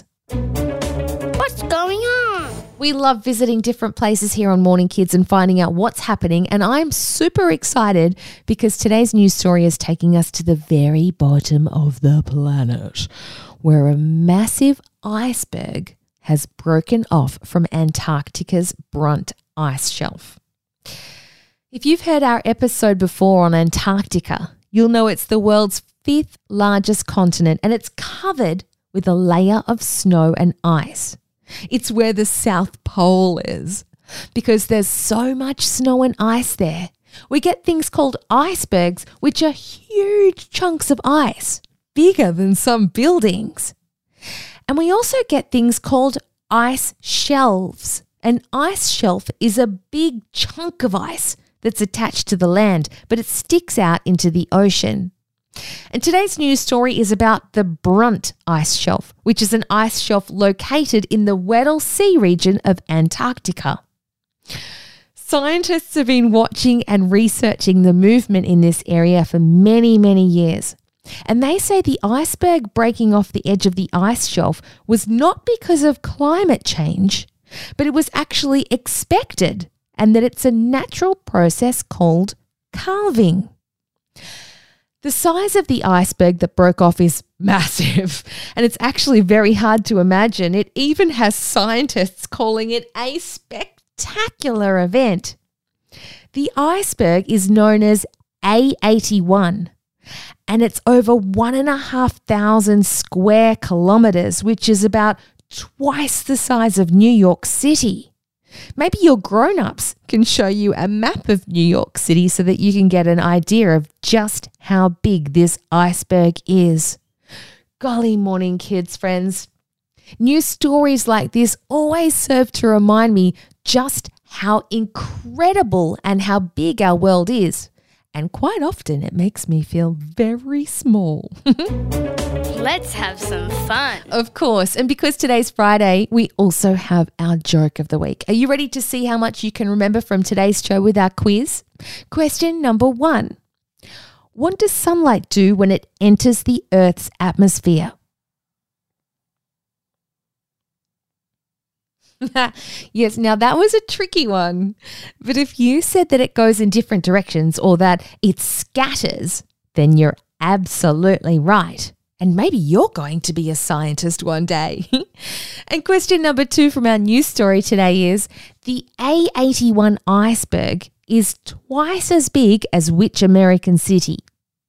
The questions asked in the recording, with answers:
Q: the A81 iceberg is twice as big as which American city?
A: Well done to anybody that said it was New York City.